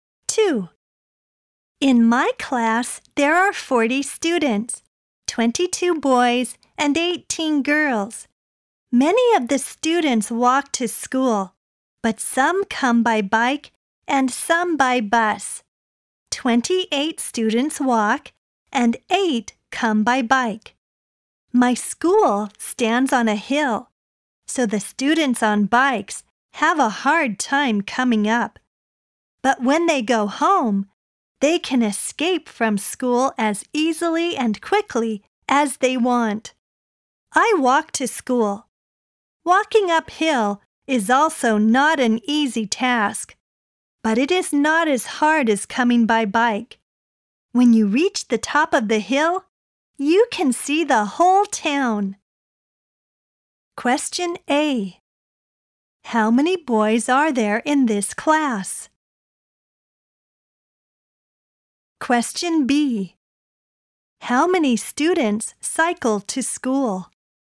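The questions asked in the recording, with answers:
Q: How many boys are there in this class?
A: 22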